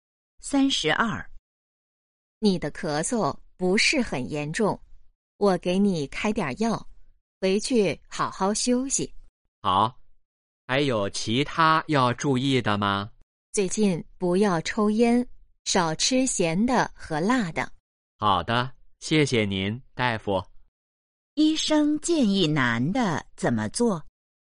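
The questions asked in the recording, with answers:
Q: 医生建议男的怎么做?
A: 不要抽烟,少吃咸的和辣的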